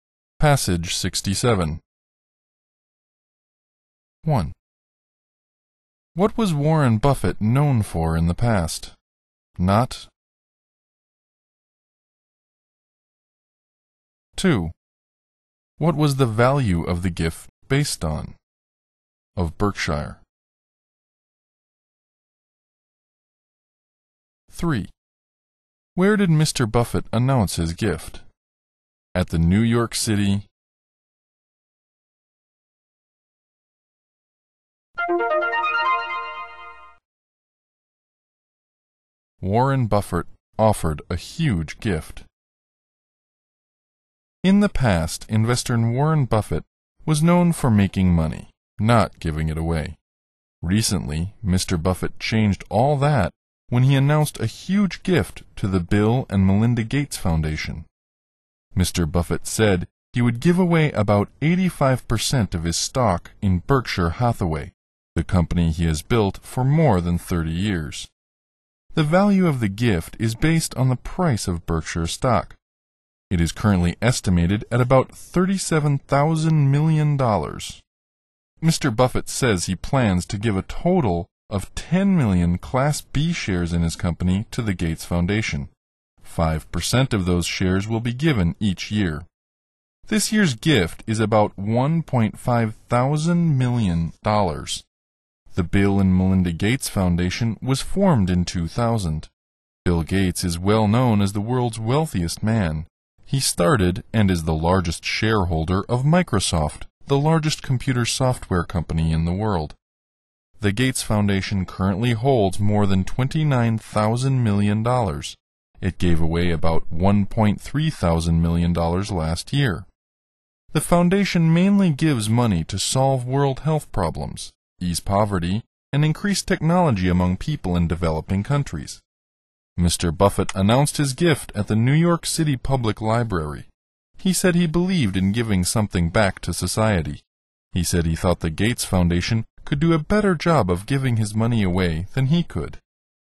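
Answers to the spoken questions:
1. Making money, not giving it away
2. The price of Berkshire stock
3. At the New York City Public Library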